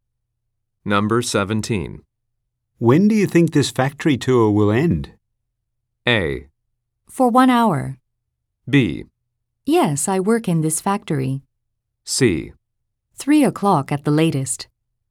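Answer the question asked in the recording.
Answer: C: 3 o'clock at the latest.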